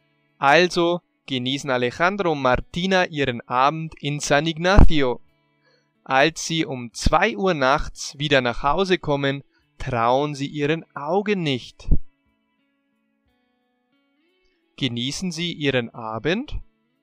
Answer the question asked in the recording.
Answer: Ja, das machen sie. Alejandro und Martina genießen ihren Abend in San Ignacio.